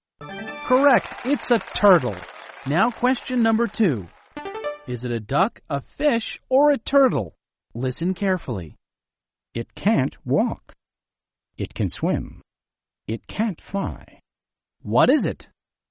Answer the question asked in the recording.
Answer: It's a fish.